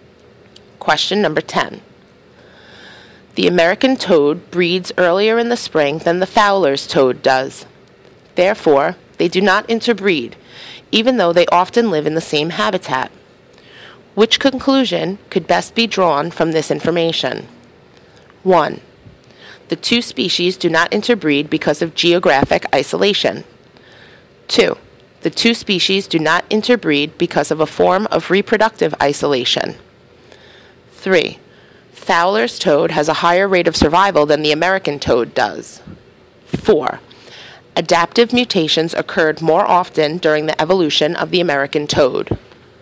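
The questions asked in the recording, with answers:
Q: Which conclusion could best be drawn from this information?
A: 2: The two species do not interbreed because of a form of reproductive isolation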